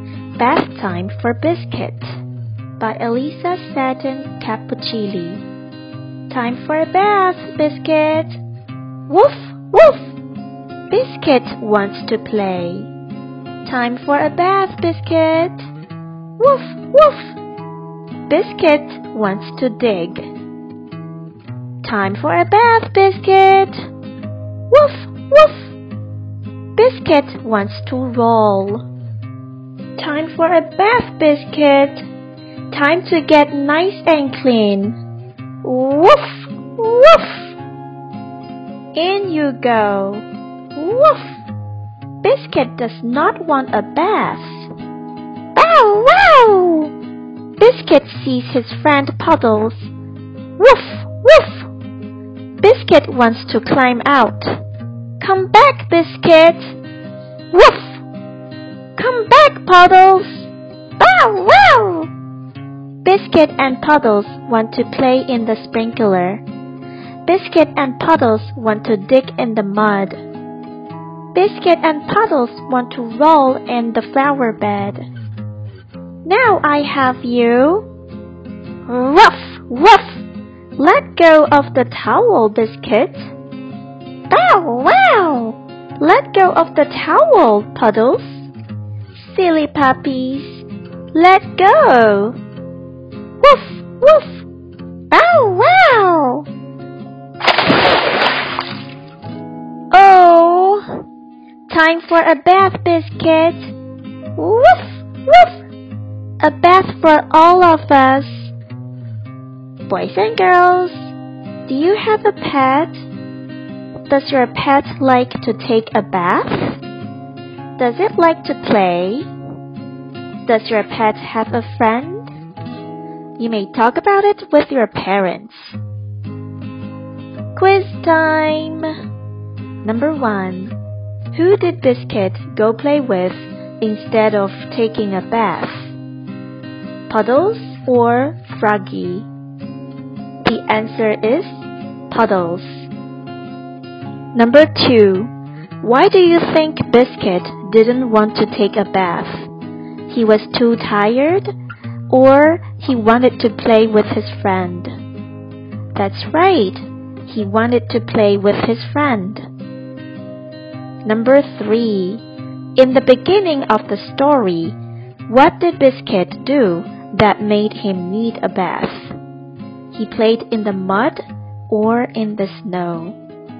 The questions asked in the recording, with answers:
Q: Who did Biscuit go play with instead of taking a bath?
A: The answer is Puddles.

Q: Why do you think Biscuit didn't want to take a bath?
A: That's right. He wanted to play with his friend.